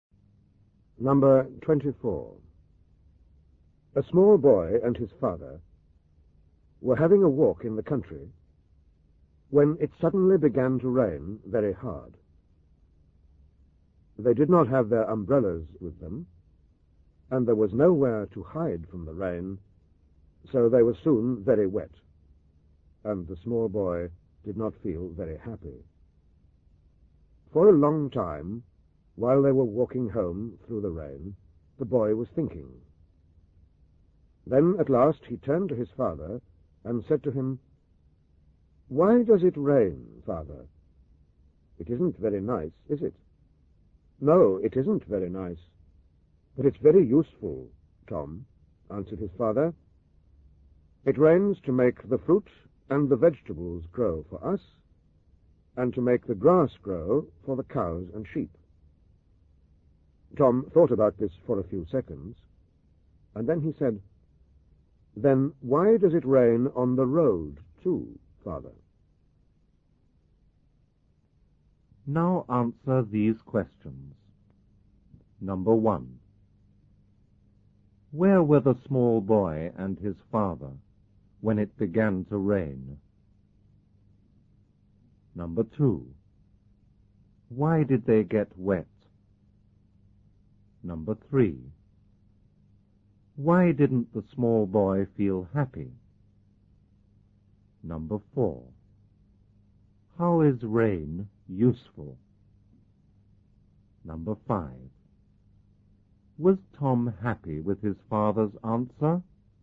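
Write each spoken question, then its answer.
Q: Where were the small boy and his father when it began to rain?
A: In the country, having a walk

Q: Why did they get wet?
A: They had no umbrellas and nowhere to hide from the rain

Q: Why didn't the small boy feel happy?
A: Because he was very wet

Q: How is rain useful?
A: It makes fruit, vegetables and grass grow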